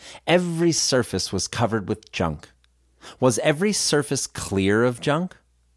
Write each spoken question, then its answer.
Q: Was every surface clear of junk?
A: No, every surface wasn't clear of junk.